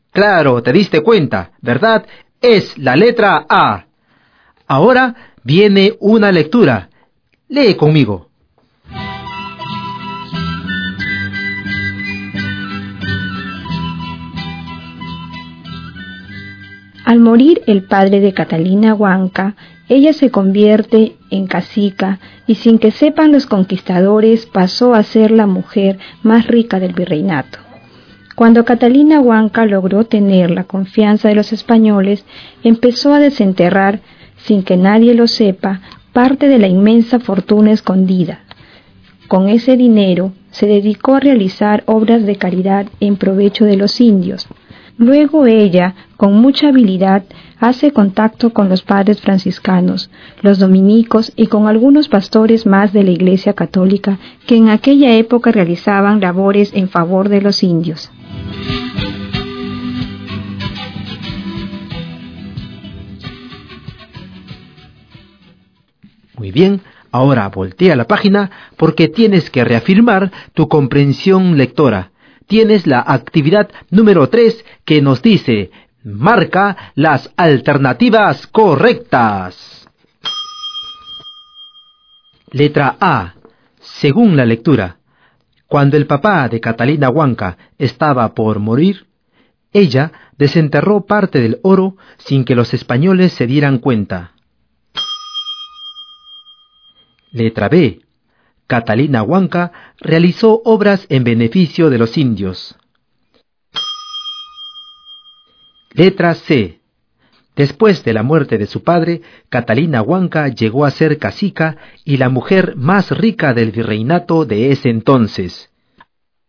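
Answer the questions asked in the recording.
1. Falso (lo desenterró después de la muerte de su padre)
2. Verdadero
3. Verdadero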